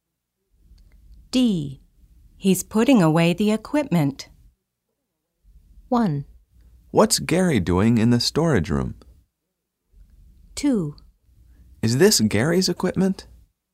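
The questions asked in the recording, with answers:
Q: He's putting away the equipment.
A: 1: What's Gary doing in the storage room?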